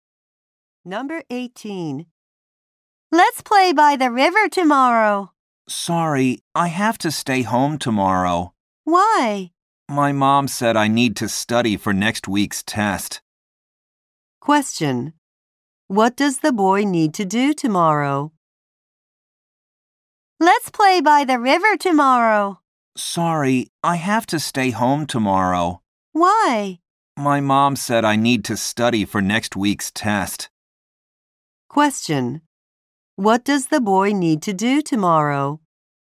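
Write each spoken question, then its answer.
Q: What does the boy need to do tomorrow?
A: Study for next week's test.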